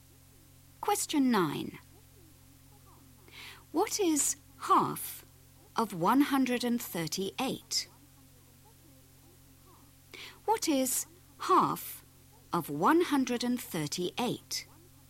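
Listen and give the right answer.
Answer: 69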